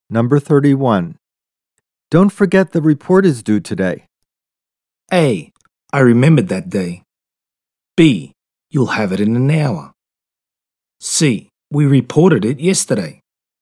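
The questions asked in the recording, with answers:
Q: Don't forget the report is due today.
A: B: You'll have it in an hour.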